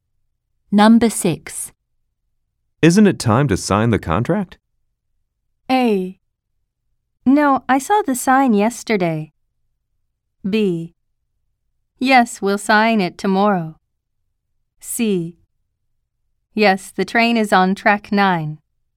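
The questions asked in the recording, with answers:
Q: Isn't it time to sign the contract?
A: A: Yes, we'll sign it tomorrow.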